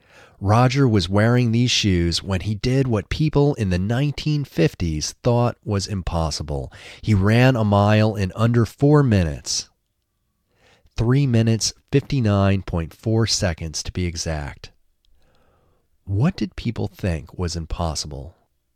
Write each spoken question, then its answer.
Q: What did people think was impossible?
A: People thought running a mile in under 4 minutes was impossible.